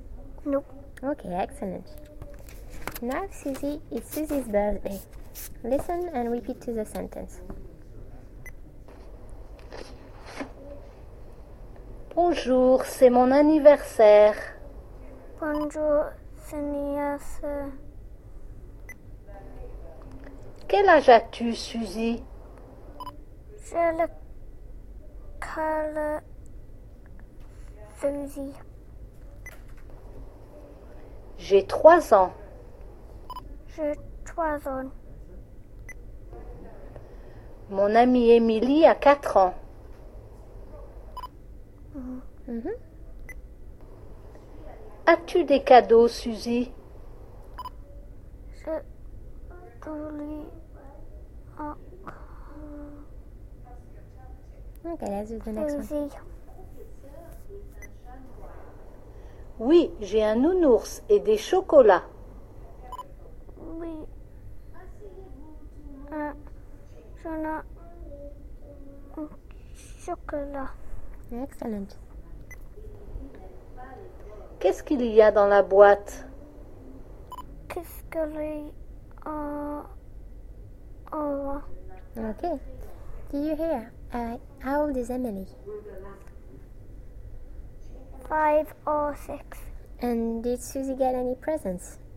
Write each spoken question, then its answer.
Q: And did Suzy get any presents?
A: Yes, she did?